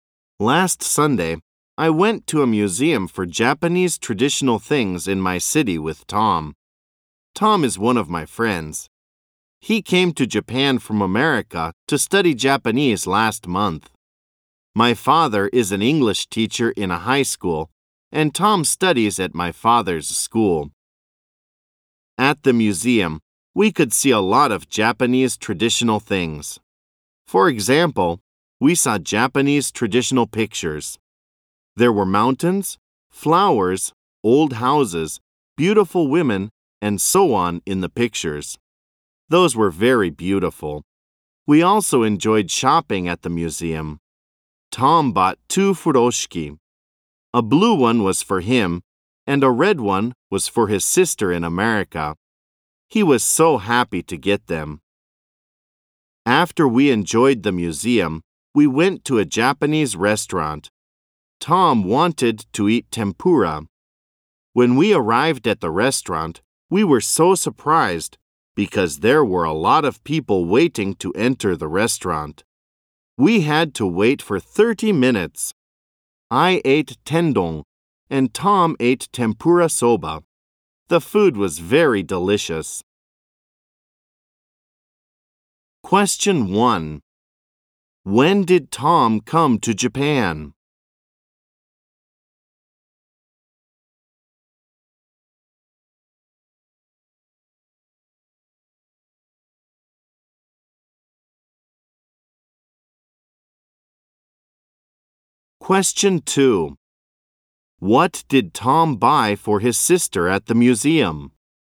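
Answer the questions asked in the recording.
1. Last month
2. A red furoshiki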